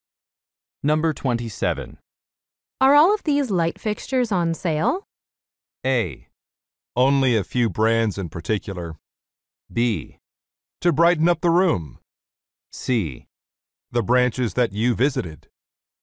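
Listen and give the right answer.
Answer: A: Only a few brands in particular.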